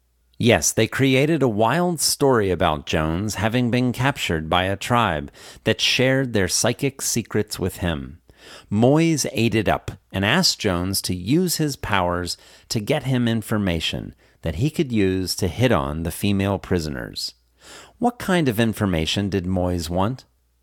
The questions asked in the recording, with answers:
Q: What kind of information did Moyes want?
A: Moyes wanted information that he could use to hit on the female prisoners.